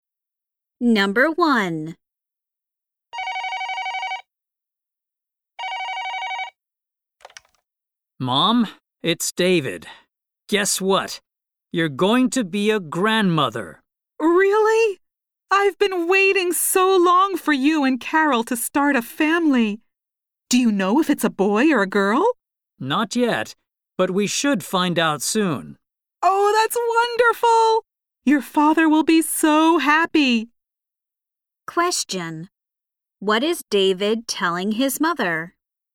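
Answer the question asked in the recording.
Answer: He and Carol are going to have a baby.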